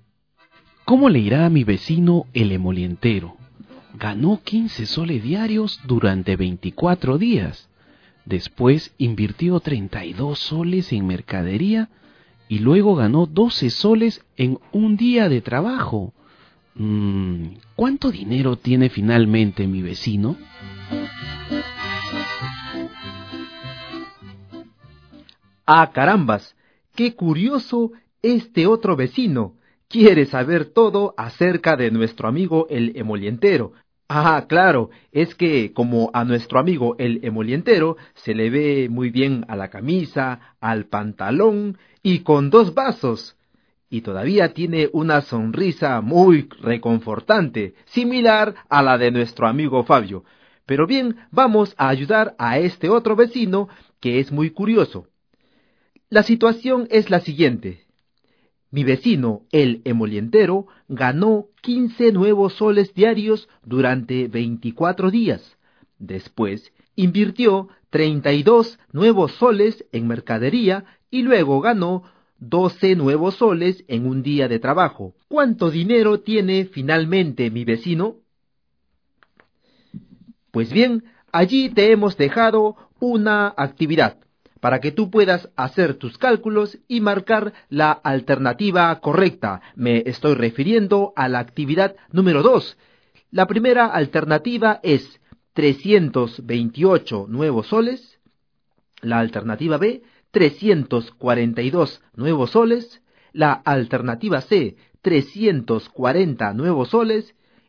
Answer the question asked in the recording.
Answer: Por lo tanto, la alternativa correcta es la letra C.